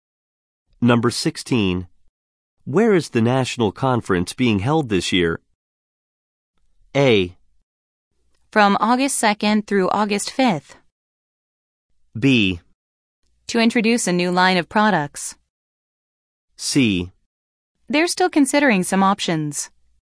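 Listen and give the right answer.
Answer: C: They're still considering some options.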